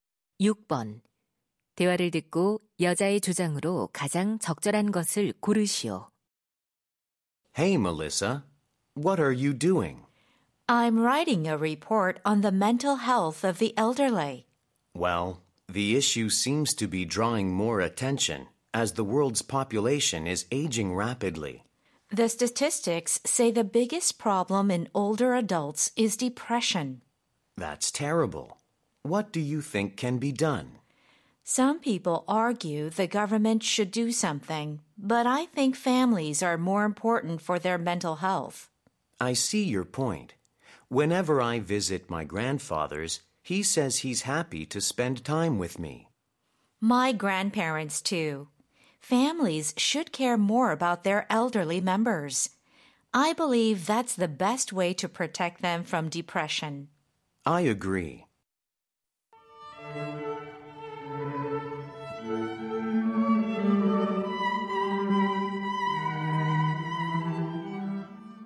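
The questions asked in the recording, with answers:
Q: 대화를 듣고 여자의 주장으로 가장 적절한 것을 고르시오.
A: 노인의 정신 건강을 위해 가족이 더 관심을 가져야 한다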